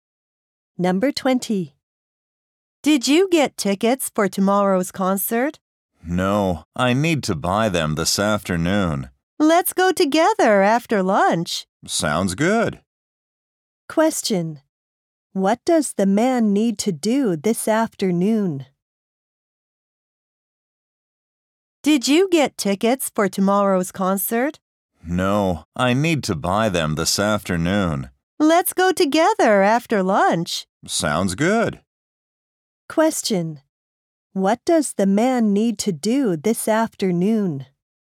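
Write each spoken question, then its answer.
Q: What does the man need to do this afternoon?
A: Buy tickets for tomorrow's concert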